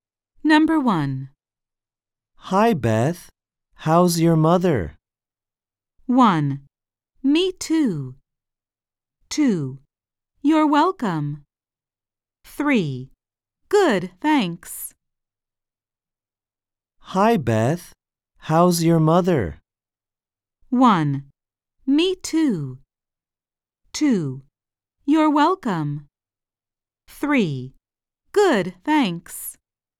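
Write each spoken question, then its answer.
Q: Hi, Beth. How's your mother?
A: 3: Good, thanks.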